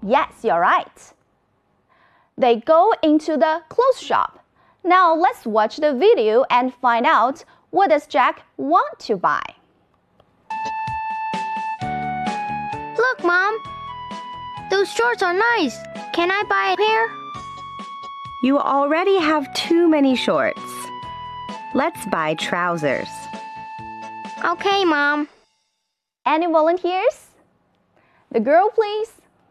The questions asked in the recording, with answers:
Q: Now, let's watch the video and find out what does Jack want to buy.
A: He wants to buy new shorts.